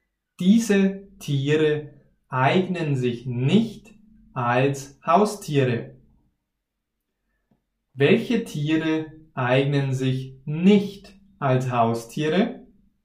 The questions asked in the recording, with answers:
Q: Welche Tiere eignen sich nicht als Haustiere?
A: Löwen und Giraffen. Sie eignen sich nicht als Haustiere.